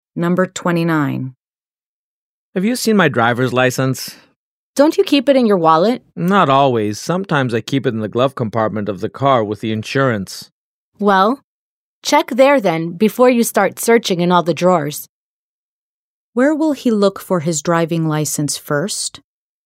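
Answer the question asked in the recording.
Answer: In the glove compartment of the car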